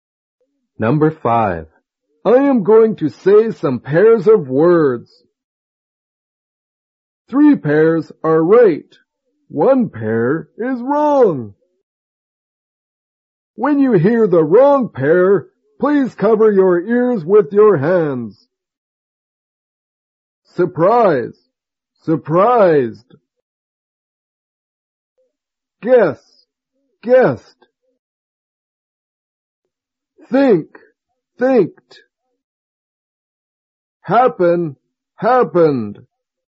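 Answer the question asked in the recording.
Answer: Think. Thinked.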